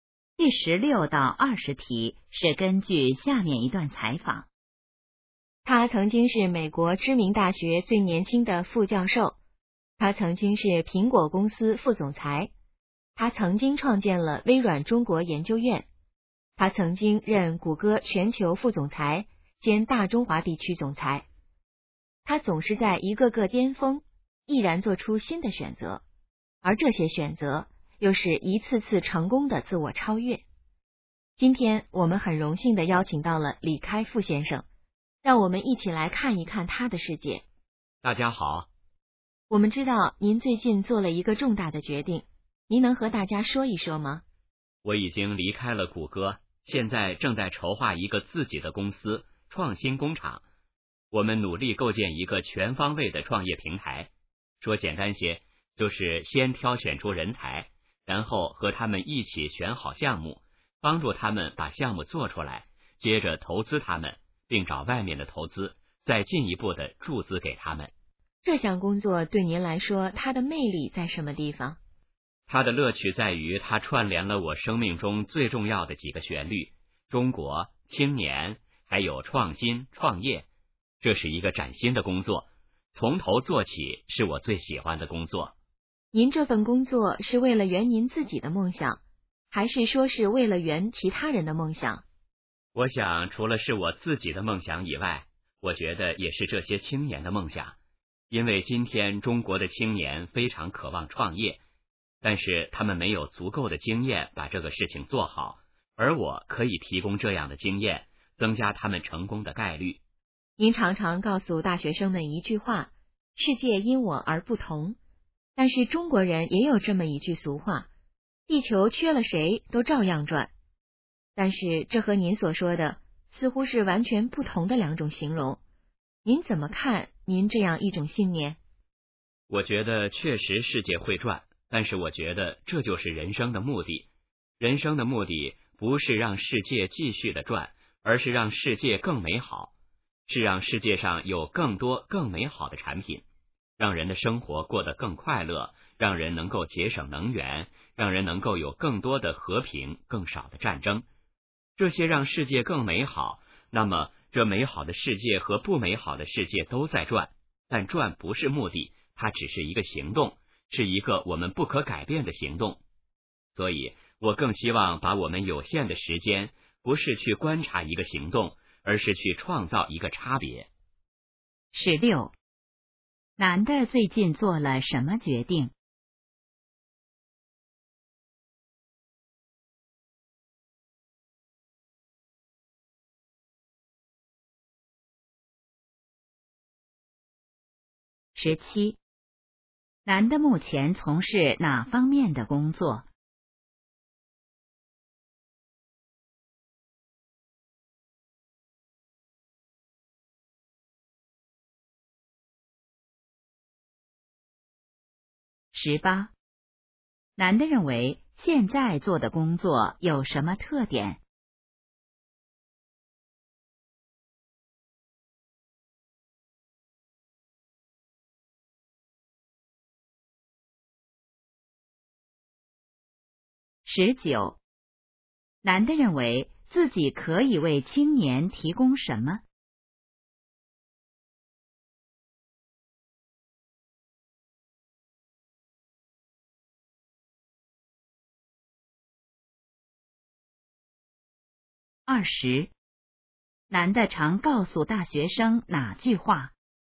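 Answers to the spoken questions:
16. 离开谷歌,筹划自己的公司创新工厂
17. 构建创业平台,帮助青年创业并投资
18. 是崭新的工作,从头做起
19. 创业经验
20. 世界因我而不同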